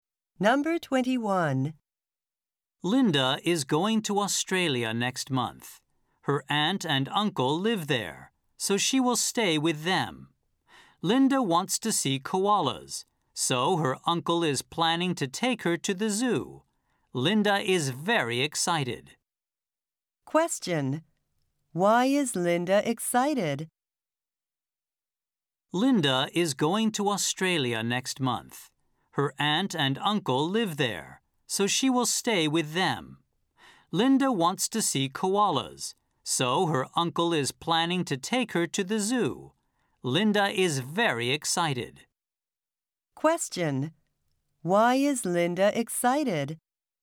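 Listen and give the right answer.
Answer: She is going to Australia next month.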